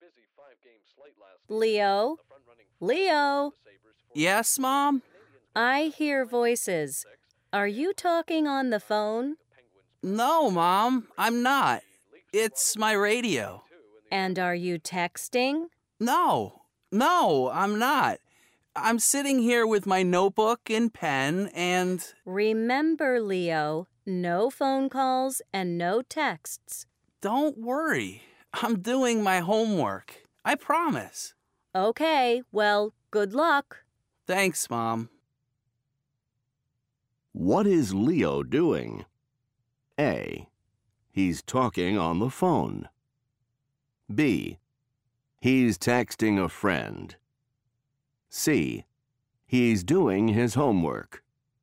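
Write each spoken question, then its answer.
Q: What is Leo doing?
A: C: He's doing his homework.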